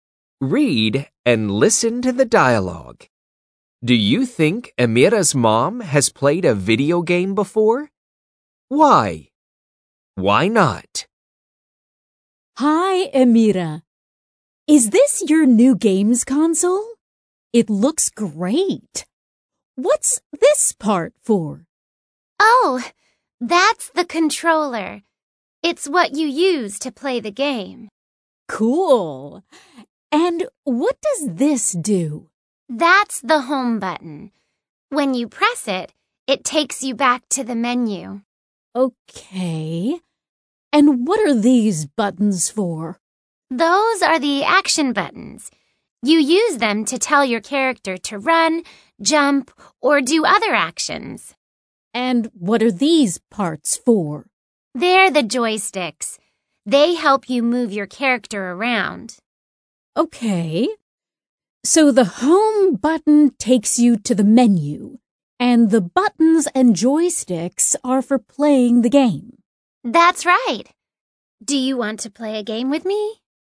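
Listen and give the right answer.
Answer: No, she doesn't know what the controller, buttons and joysticks are for.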